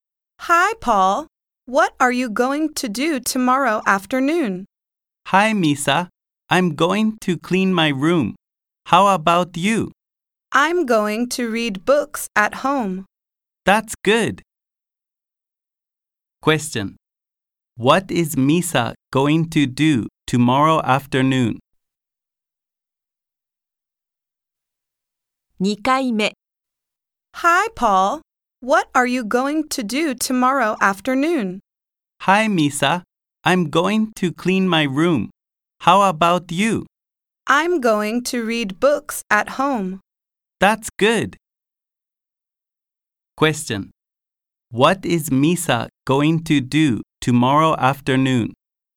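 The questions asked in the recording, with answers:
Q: What is Misa going to do tomorrow afternoon?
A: Read books at home.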